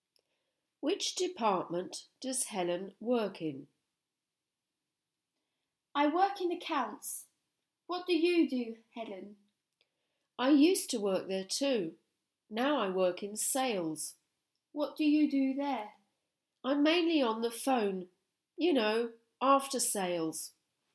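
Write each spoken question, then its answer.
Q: Which department does Helen work in?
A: Sales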